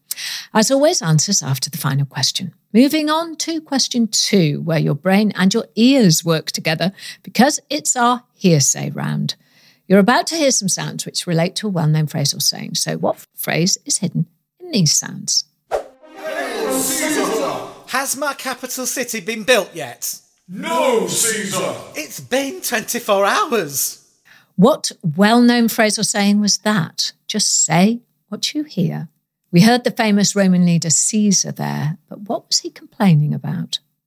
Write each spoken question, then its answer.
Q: What well-known phrase or saying was that?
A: And the phrase we heard was Rome wasn't built in a day.